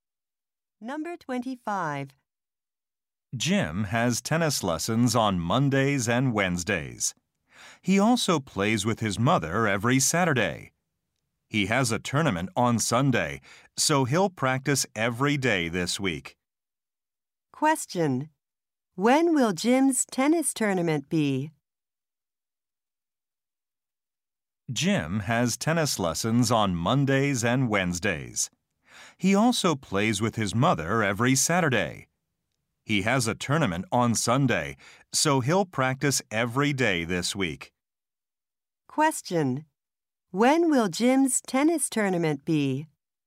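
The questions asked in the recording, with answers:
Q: When will Jim's tennis tournament be?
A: On Sunday.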